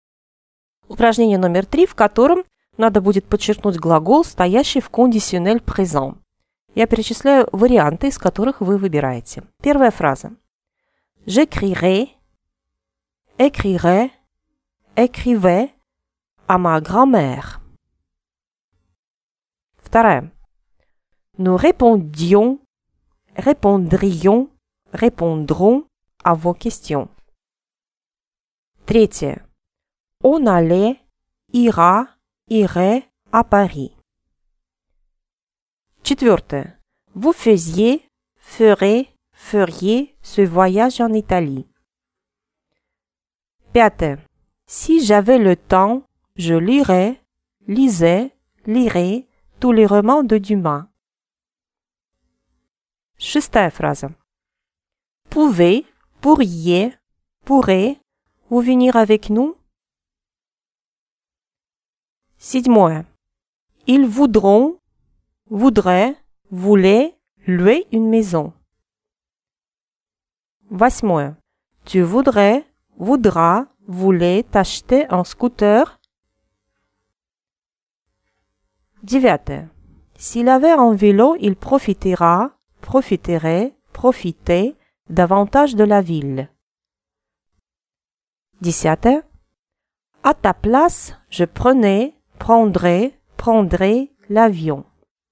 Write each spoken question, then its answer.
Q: Nous répondions, répondrions, répondrons à vos questions.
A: Nous répondrions à vos questions.

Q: On allait, ira, irait à Paris.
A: On irait à Paris.

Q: Vous faisiez, ferez, feriez ce voyage en Italie.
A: Vous feriez ce voyage en Italie.

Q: Pouvez, pourriez, pourrez vous venir avec nous?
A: Pourriez-vous venir avec nous?

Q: Ils voudront, voudraient, voulaient louer une maison.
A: Il voudrait louer une maison.

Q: Tu voudrais, voudras, voulais t'acheter un scooter?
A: Tu voudrais t'acheter un scooter?

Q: S'il avait un vélo, il profitera, profiterait, profitait davantage de la ville.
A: S'il avait un vélo, il profiterait davantage de la ville.